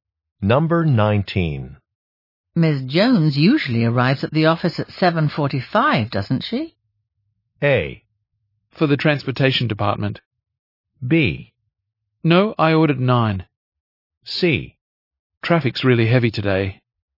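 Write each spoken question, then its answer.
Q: Ms. Jones usually arrives at the office at 7:45, doesn't she?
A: C: Traffic's really heavy today.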